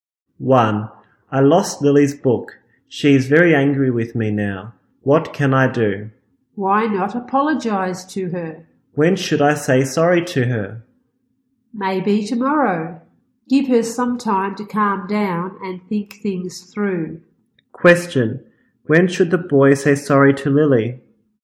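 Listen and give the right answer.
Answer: Tomorrow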